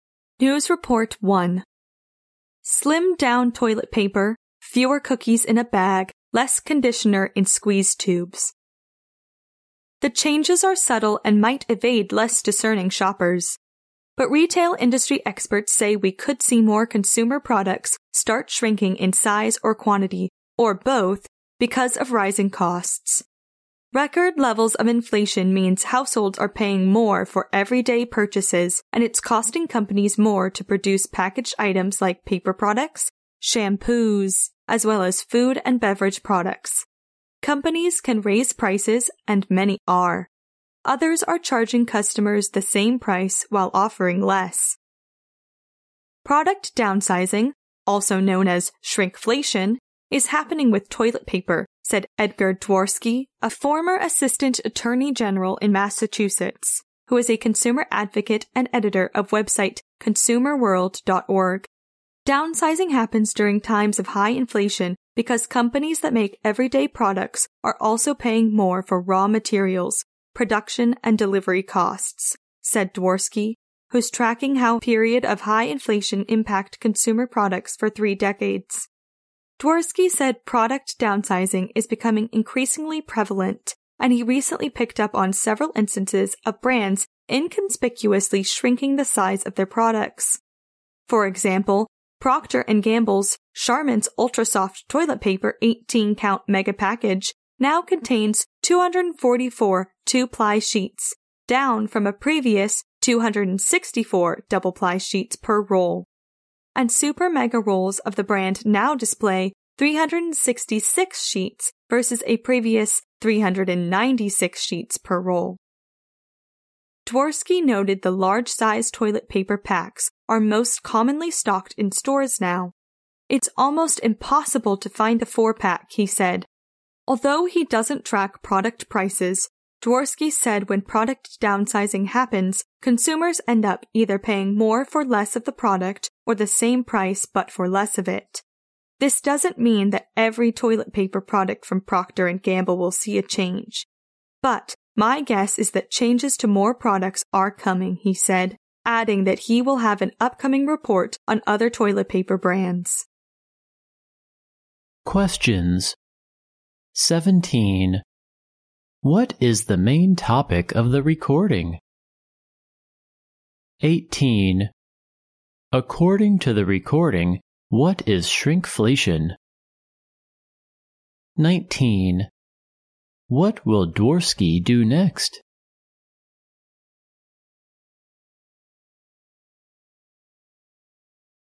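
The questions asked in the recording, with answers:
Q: What is the main topic of the recording?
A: Products shrinking in size or quantity because of rising costs (shrinkflation)

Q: According to the recording, what is shrinkflation?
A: Product downsizing: charging the same price while offering less

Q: What will Dworsky do next?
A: Publish a report on other toilet paper brands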